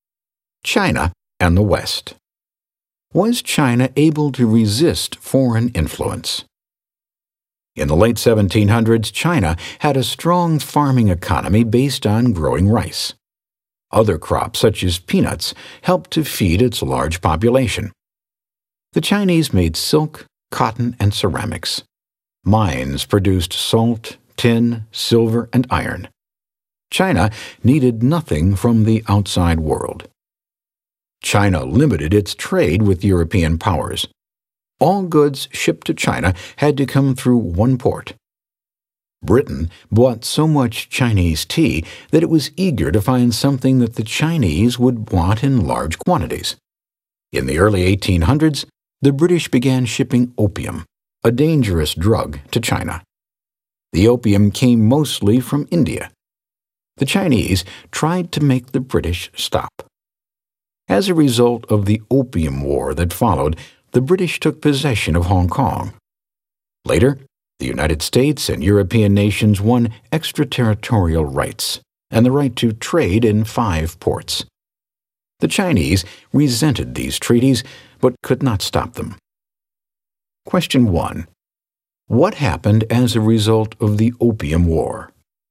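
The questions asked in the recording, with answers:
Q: What happened as a result of the Opium War?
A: The British took possession of Hong Kong, and the United States and European nations won extraterritorial rights and trade in five ports.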